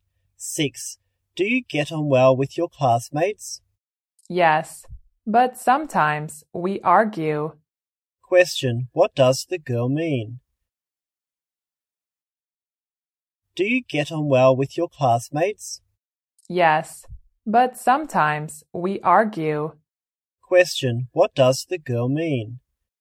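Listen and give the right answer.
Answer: She gets on well with her classmates but sometimes they argue.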